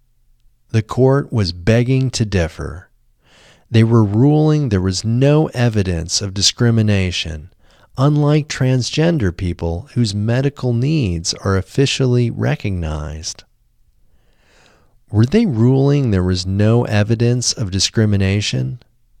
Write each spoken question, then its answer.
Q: Were they ruling there was no evidence of discrimination?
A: Yes, they were ruling there was no evidence of discrimination.